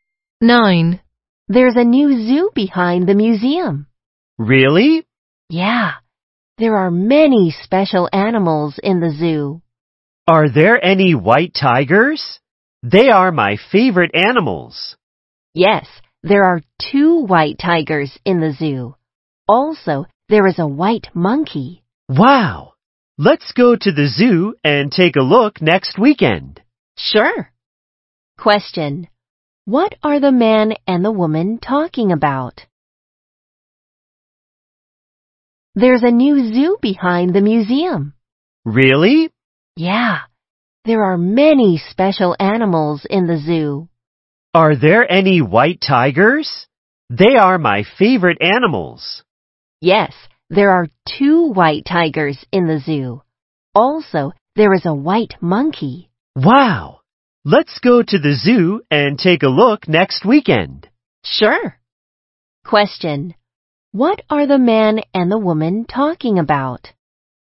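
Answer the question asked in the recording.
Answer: A new zoo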